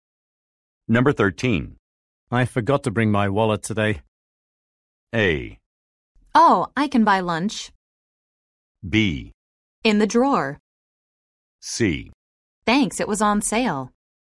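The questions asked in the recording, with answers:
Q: I forgot to bring my wallet today.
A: A: Oh, I can buy lunch.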